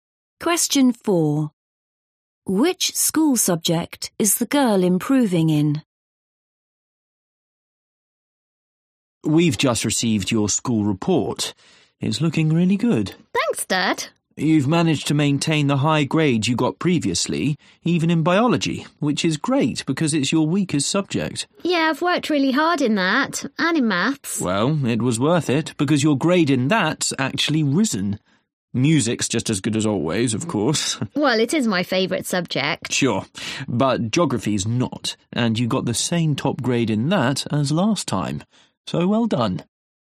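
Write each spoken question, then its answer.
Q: Which school subject is the girl improving in?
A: Maths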